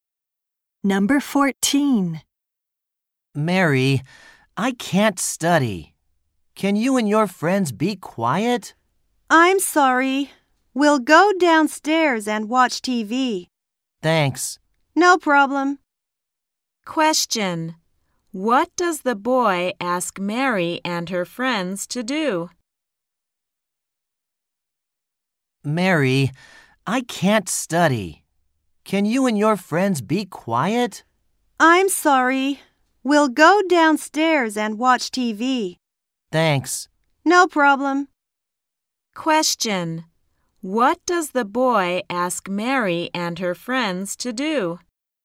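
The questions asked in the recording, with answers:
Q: What does the boy ask Mary and her friends to do?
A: Be quiet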